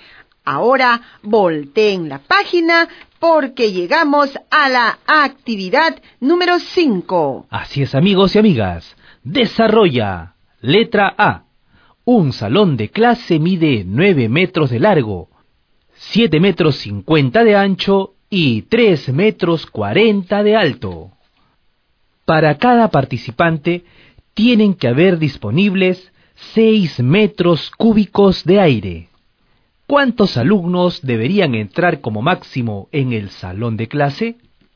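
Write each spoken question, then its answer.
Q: ¿Cuántos alumnos deberían entrar como máximo en el salón de clase?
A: 38 alumnos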